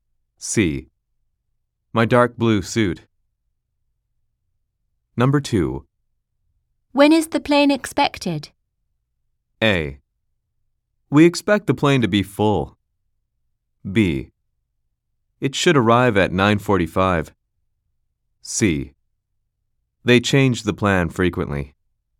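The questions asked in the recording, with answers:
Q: When is the plane expected?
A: B: It should arrive at 9:45.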